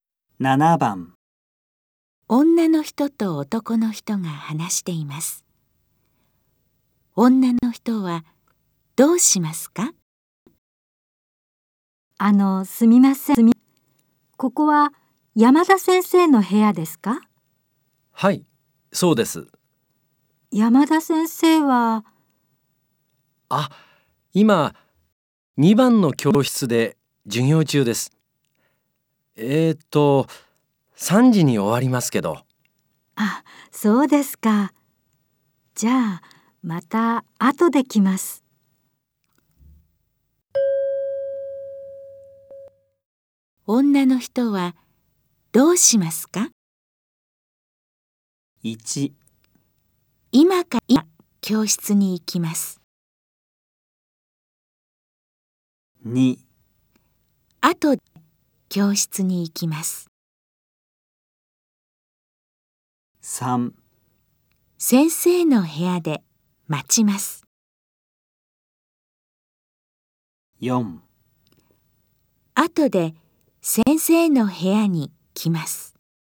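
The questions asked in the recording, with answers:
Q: 女の人はどうしますか?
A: 4: あとで先生の部屋に来ます。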